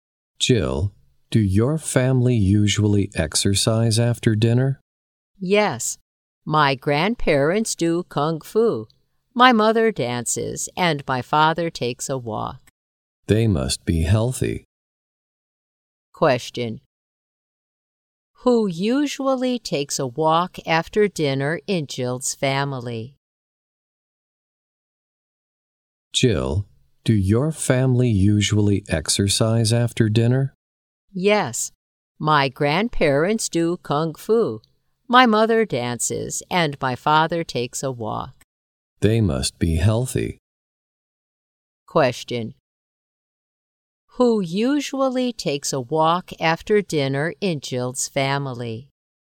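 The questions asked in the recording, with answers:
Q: Who usually takes a walk after dinner in Jill's family?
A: Her father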